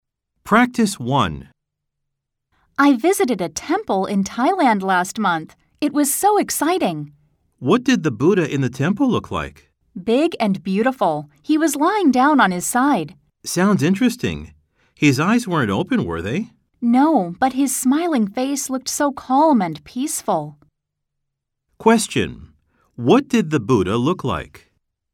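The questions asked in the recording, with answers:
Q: What did the Buddha look like?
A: Big and beautiful, lying on his side with his eyes closed and a calm smiling face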